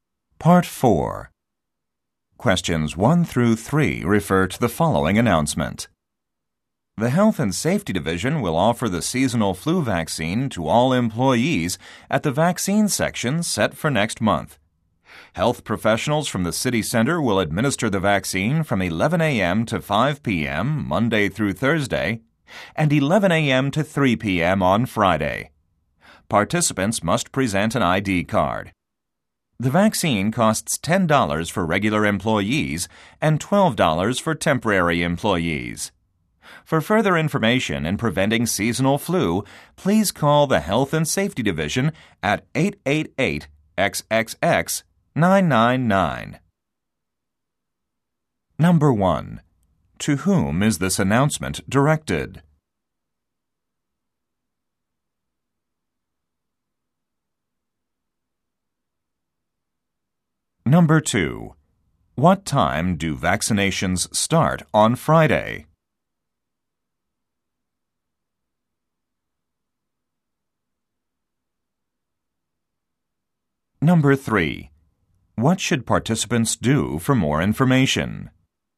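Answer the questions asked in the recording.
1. Employees
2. 11 a.m.
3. Call the Health and Safety Division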